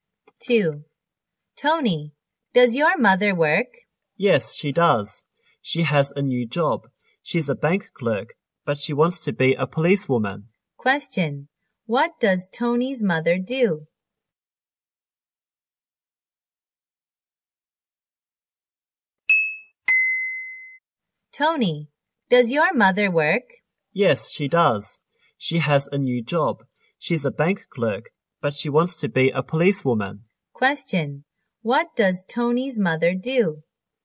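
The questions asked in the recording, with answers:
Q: What does Tony's mother do?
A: She's a bank clerk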